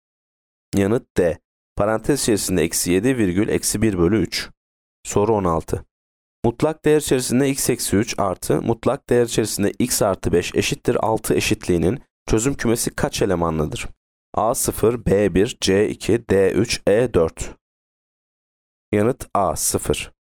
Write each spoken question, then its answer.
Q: Mutlak değer içerisinde x eksi 3 artı mutlak değer içerisinde x artı 5 eşittir 6 eşitliğinin çözüm kümesi kaç elemanlıdır?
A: Yanıt A 0.